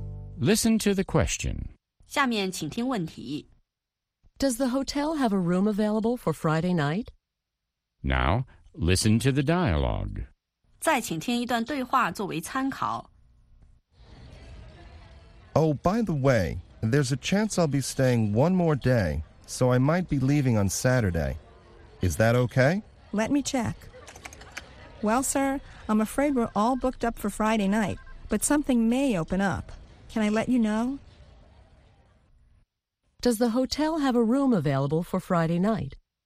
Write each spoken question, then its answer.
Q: Does the hotel have a room available for Friday night?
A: No, the hotel is fully booked on Friday night.